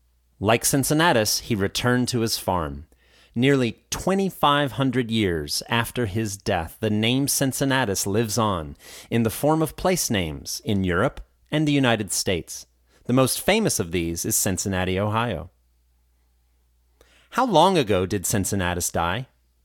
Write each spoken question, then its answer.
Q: How long ago did Cincinnatus die?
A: Cincinnatus died approximately 2,500 years ago.